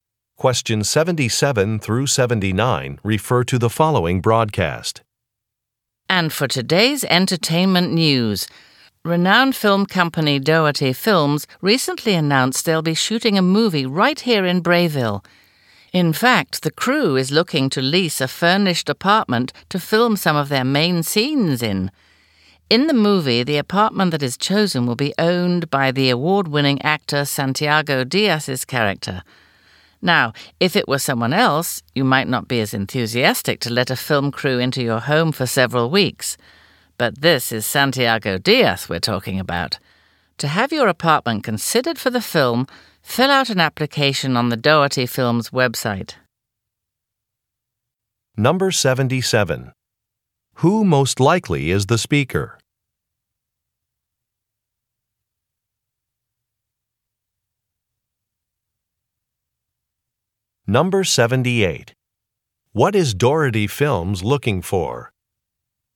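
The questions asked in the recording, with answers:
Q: Who most likely is the speaker?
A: A radio news reporter

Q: What is Doherty Films looking for?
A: A furnished apartment to film in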